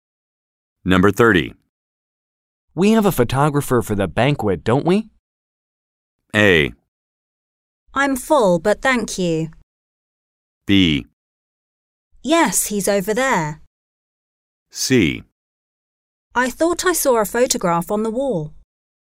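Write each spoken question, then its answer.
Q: We have a photographer for the banquet, don't we?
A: B: Yes, he's over there.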